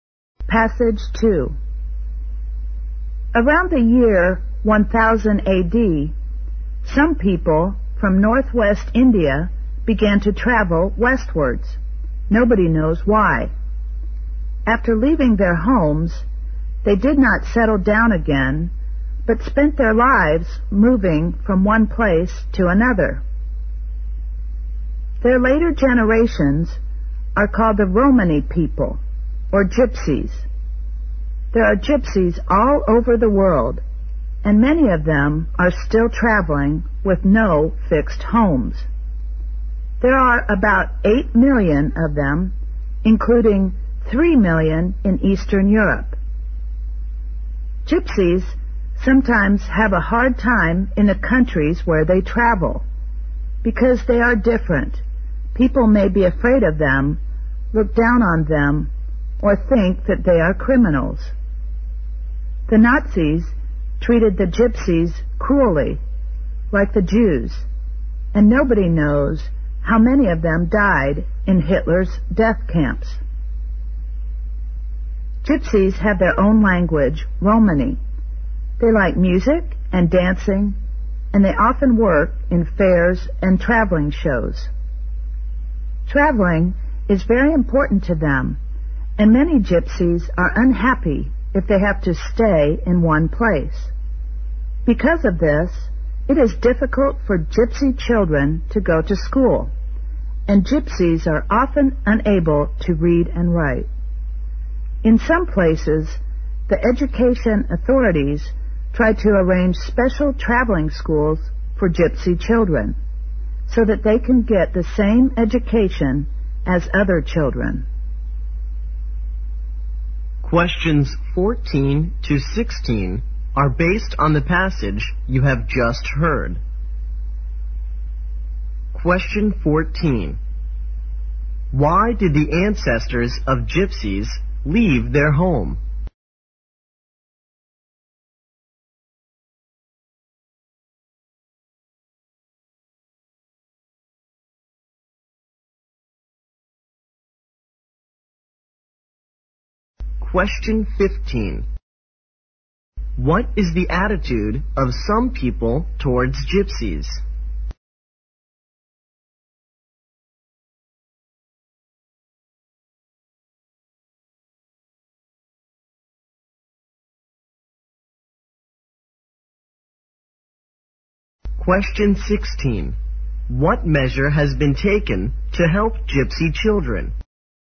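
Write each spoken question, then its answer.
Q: Why did the ancestors of gypsies leave their home?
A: Nobody knows why

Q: What is the attitude of some people towards gypsies?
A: They are afraid of them, look down on them, or think they are criminals

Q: What measure has been taken to help gypsy children?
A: Special traveling schools have been arranged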